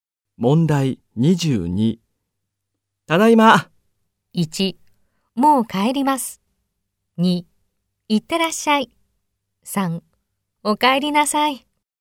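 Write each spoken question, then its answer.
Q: ただいま。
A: 1: お帰りなさい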